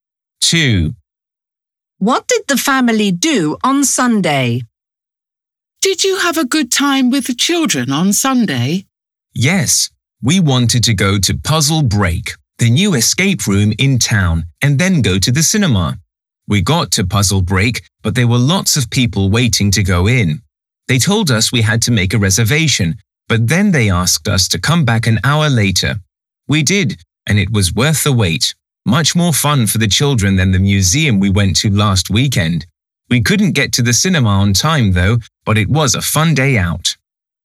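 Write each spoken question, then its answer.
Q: What did the family do on Sunday?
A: They went to the Puzzle Break escape room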